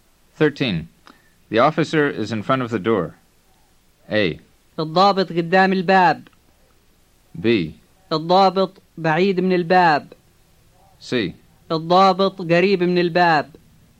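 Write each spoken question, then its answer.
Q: The officer is in front of the door.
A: A: الضابط قدام الباب.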